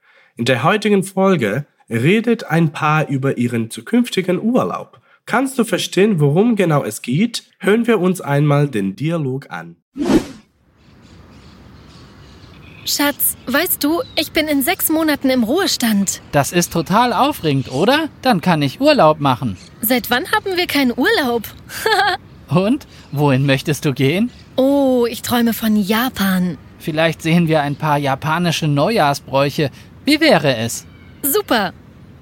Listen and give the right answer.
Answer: Du hast es bestimmt bemerkt, dass das Paar eine Reise plant.